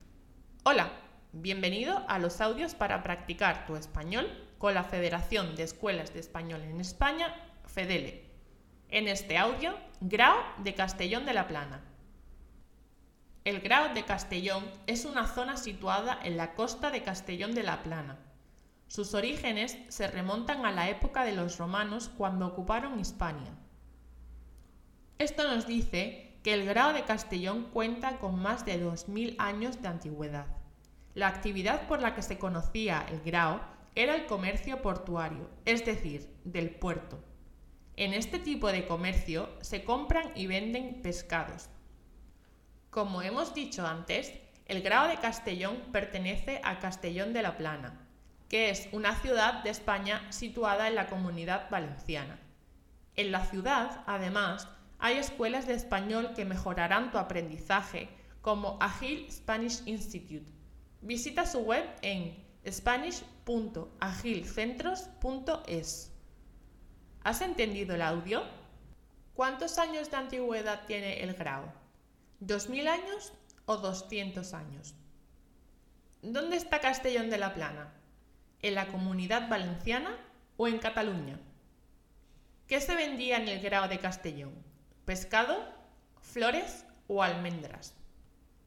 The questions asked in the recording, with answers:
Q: ¿Cuántos años de antigüedad tiene el grado?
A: 2000 años

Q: ¿Dónde está Castellón de la Plana?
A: Comunidad Valenciana

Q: ¿Qué se vendía en el grado de Castellón?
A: pescado